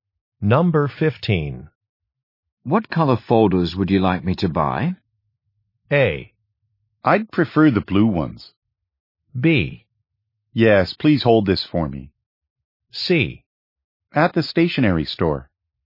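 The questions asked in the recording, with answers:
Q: What color folders would you like me to buy?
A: A: I'd prefer the blue ones.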